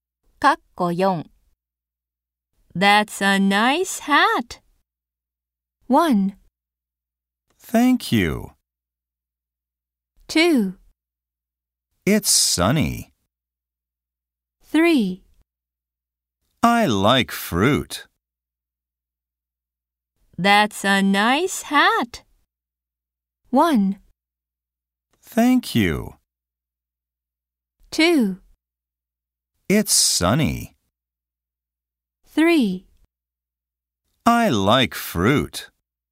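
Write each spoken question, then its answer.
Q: That's a nice hat.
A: 1: Thank you.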